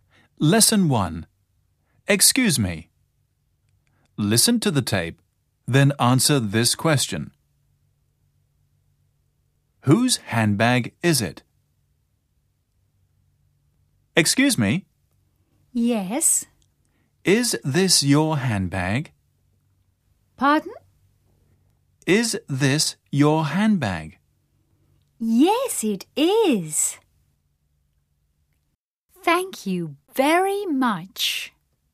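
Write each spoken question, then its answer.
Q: Whose handbag is it?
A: It belongs to the person who was asked; she says, "Yes, it is."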